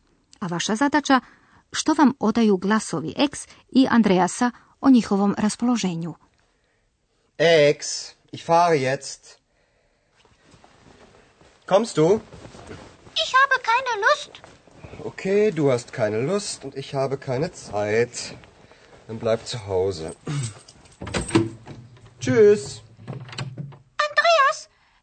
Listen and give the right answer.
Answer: Dakle, da li ste primijetili da je ex bezvoljna, a Andreas prilično i živciran?